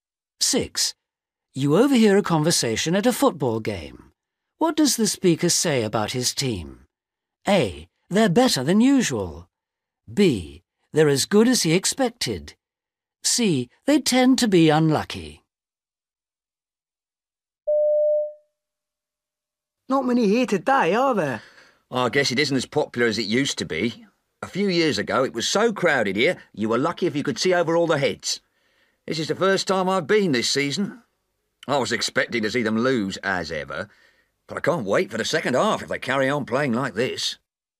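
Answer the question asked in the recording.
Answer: A: They're better than usual.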